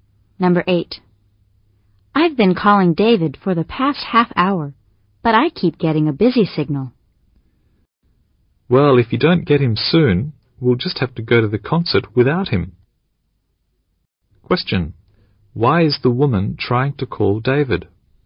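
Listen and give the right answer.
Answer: To go to the concert with him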